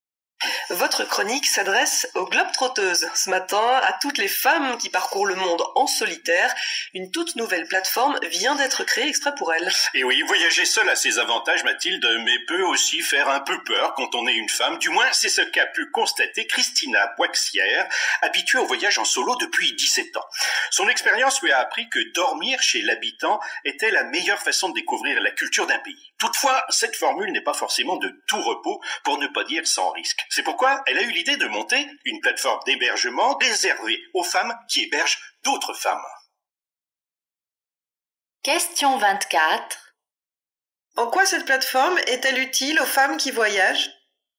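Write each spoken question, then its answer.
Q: En quoi cette plateforme est-elle utile aux femmes qui voyagent ?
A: Elle leur permet d'être hébergées chez d'autres femmes, pour loger chez l'habitant avec moins de risques.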